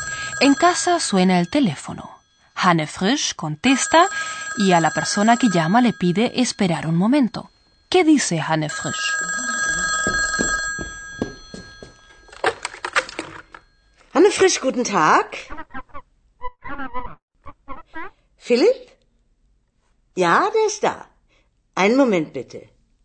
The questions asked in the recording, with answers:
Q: ¿Qué dice Hanne Frisch?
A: Hanne Frisch le dice a su interlocutora, un momento, por favor.